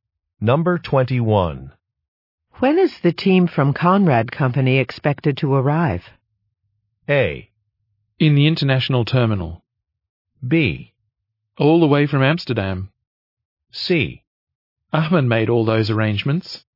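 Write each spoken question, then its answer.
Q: When is the team from Conrad Company expected to arrive?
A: C: Ahmed made all those arrangements.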